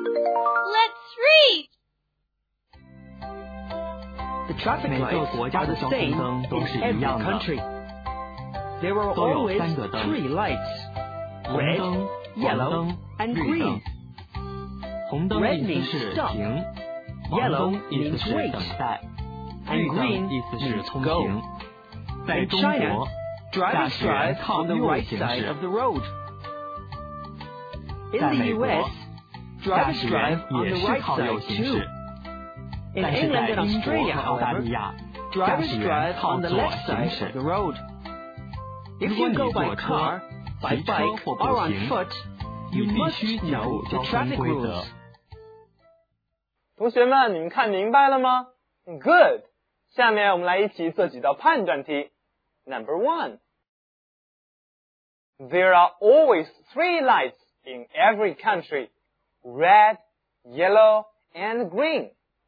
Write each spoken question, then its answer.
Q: there are always three lights in every country, red, yellow, and green.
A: Right.